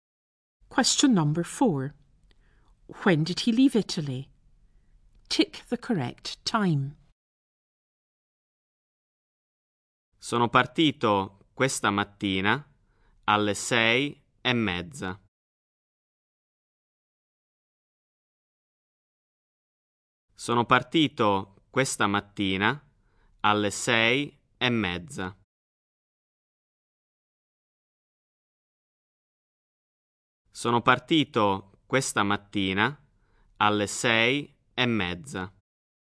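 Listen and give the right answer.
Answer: This morning at 6:30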